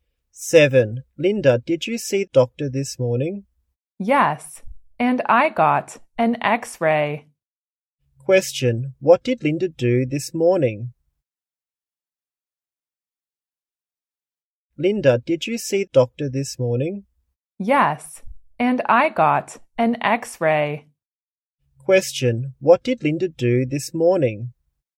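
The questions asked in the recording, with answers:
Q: what did Linda do this morning?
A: She saw the doctor and got an x-ray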